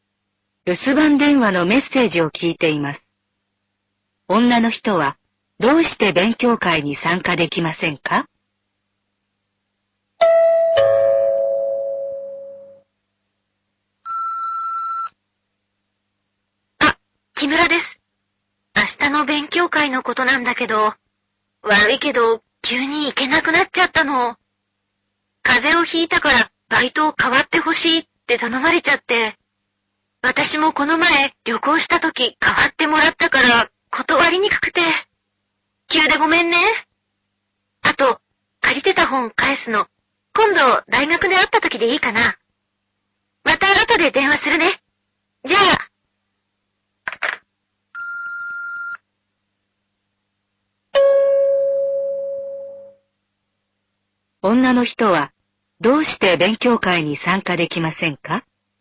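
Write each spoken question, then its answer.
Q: 女の人はどうして勉強会に参加できませんか?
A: 風邪をひいた人のバイトを代わることになったから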